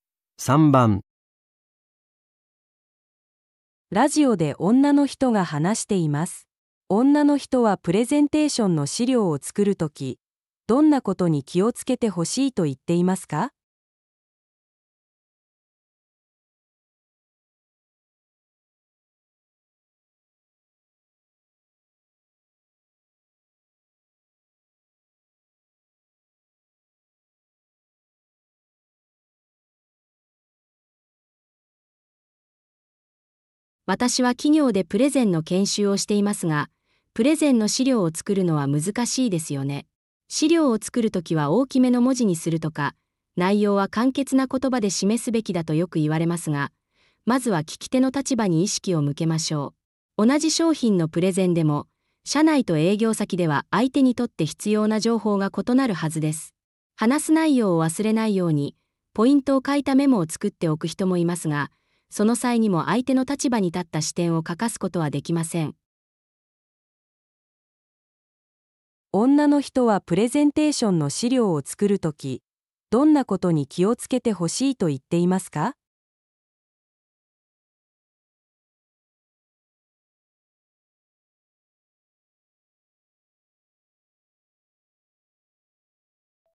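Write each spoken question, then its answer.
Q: 女の人はプレゼンテーションの資料を作るとき、どんなことに気をつけてほしいと言っていますか?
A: 聞き手(相手)の立場に意識を向けること

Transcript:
ラジオで女の人が話しています。女の人はプレゼンテーションの資料を作る時、どんなことに気をつけてほしいと言っていますか。
女:私は企業でプレゼンの研修をしていますが、プレゼンの資料を作るのは難しいですよね。
資料を作る時は大きめの文字にするとか内容は簡潔な言葉で示すべきだとよく言われますが、まずは聞き手の立場に意識を向けましょう。
同じ商品のプレゼンでも社内と営業先では相手にとって必要な情報が異なるはずです。
話す内容を忘れないようにポイントを書いたメモを作っておく人もいますが、その際にも相手の立場に立った視点を欠かすことはできません。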